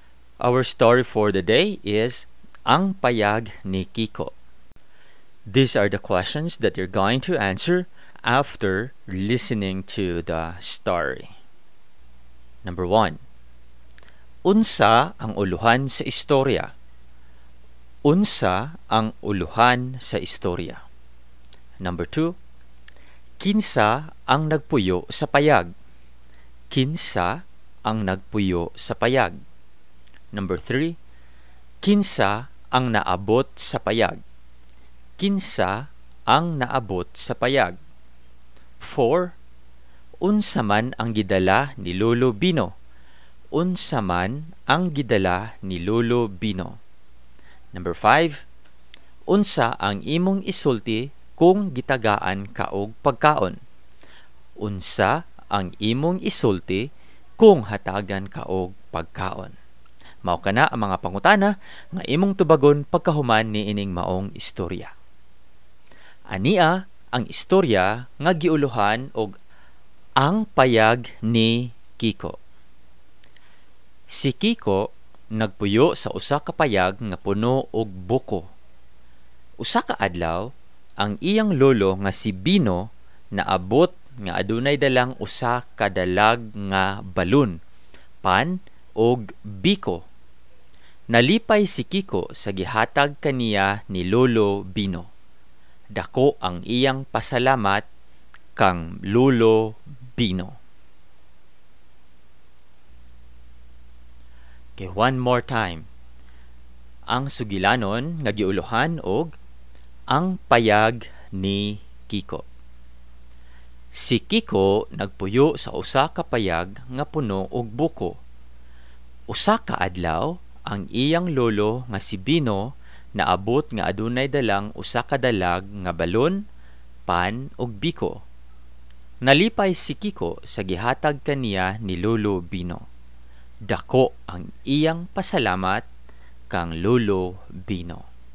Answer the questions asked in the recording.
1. Tama. Ang payag ni Kiko. Mao kana ang uluhan sa istorya.
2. Ug ang insaktong tubag, si Kiko.
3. Correct. Si Lolo Bino. Very good.
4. Dalag nga balon, pan, og biko.
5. In Cebuano, that is, daghang salamat.